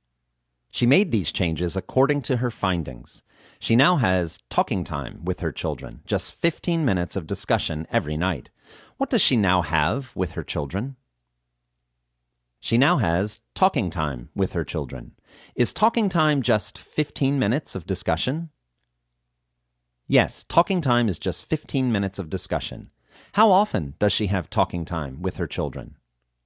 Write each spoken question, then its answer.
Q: How often does she have talking time with her children?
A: She has talking time with her children every night.